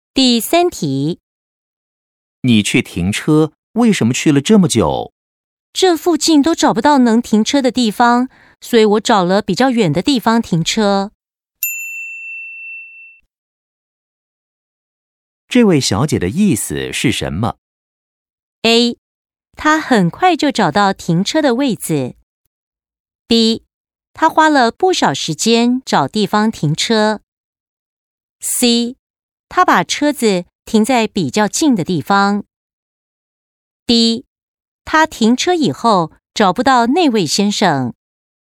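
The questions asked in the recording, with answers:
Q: 这位小姐的意思是什么?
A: B: 她花了不少时间找地方停车。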